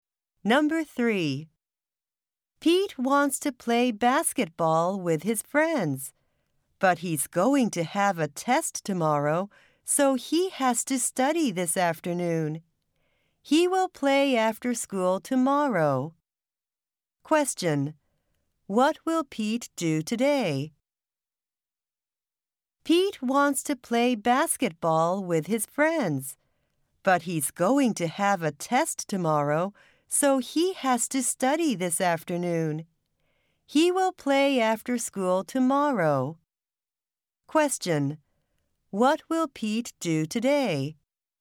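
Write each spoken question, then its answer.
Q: What will Pete do today?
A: Study for his test this afternoon.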